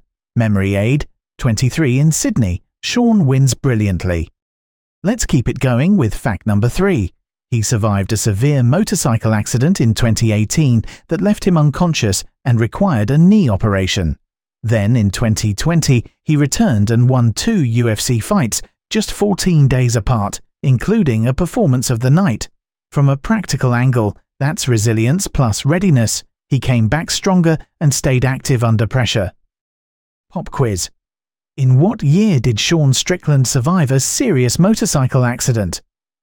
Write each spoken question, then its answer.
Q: In what year did Sean Strickland survive a serious motorcycle accident?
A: Correct answer, 2018.